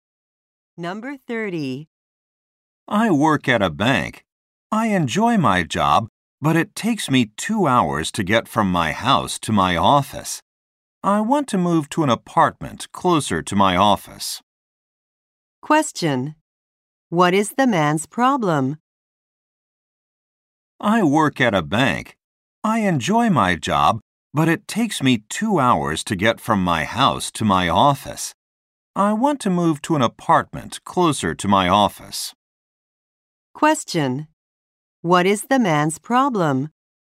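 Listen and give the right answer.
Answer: His office is far from his house.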